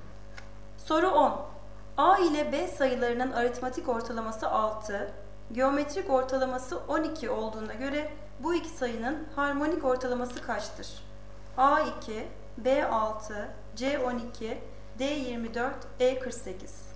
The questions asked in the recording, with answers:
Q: A ile B sayılarının aritmetik ortalaması 6, geometrik ortalaması 12 olduğuna göre bu iki sayının harmonik ortalaması kaçtır?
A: Doğru cevap D 24.